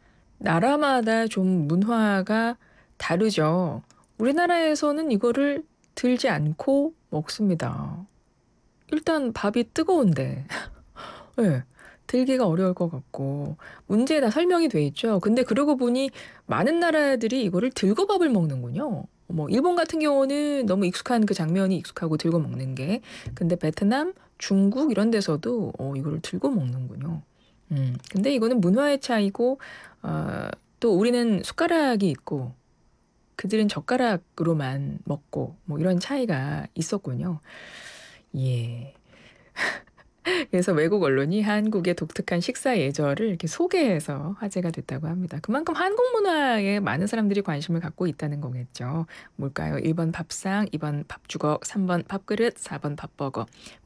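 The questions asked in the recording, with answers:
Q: 뭘까요? 1번 밥상, 2번 밥주걱, 3번 밥그릇, 4번 밥버거.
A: 3: 밥그릇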